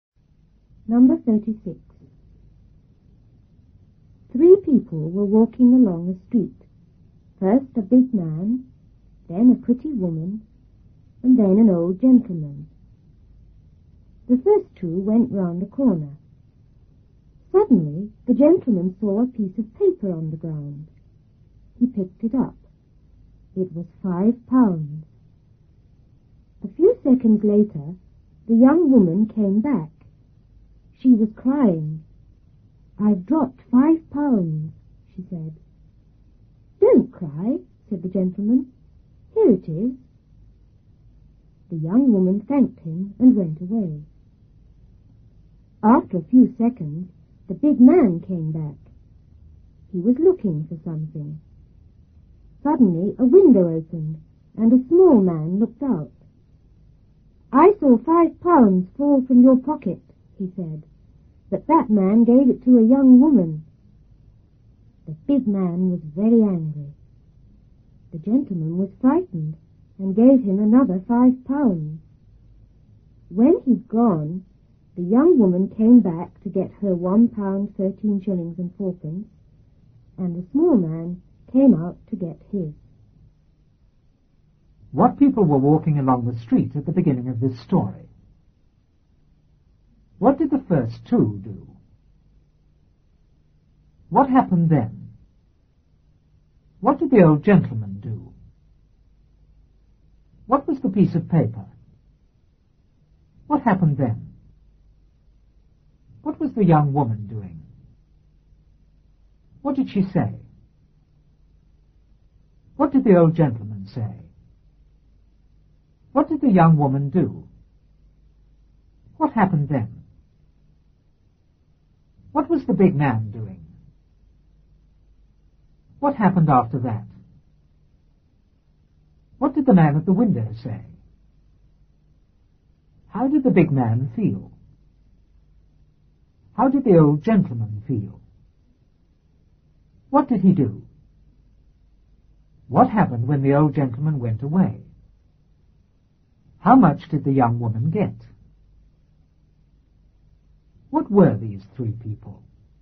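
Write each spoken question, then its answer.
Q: What people were walking along the street at the beginning of this story?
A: A big man, a pretty woman and an old gentleman

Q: What did the first two do?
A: They went round a corner

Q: What did the old gentleman do?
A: He saw a piece of paper on the ground and picked it up

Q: What was the young woman doing?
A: Crying

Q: What did she say?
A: "I've dropped £5"

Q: What did the old gentleman say?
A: "Don't cry. Here it is."

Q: What did the young woman do?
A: She thanked him and went away

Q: What was the big man doing?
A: Looking for something

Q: What happened after that?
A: A window opened and a small man looked out

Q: What did the man at the window say?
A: He saw £5 fall from the big man's pocket, but that man gave it to a young woman

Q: How did the big man feel?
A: Very angry

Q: How did the old gentleman feel?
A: Frightened

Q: What did he do?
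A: He gave the big man another £5

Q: What happened when the old gentleman went away?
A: The young woman came back to get her share, and the small man came out to get his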